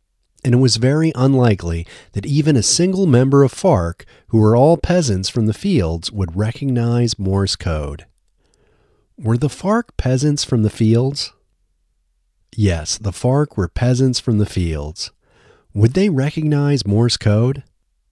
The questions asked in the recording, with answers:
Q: Would they recognize Morse code?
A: No, they wouldn't recognize Morse code.